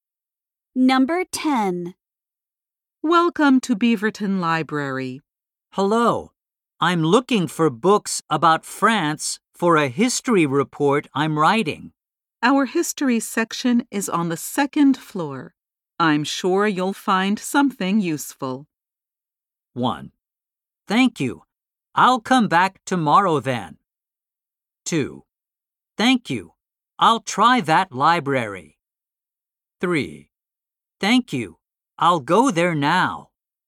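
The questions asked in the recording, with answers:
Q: I'm sure you'll find something useful.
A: 3: Thank you. I'll go there now.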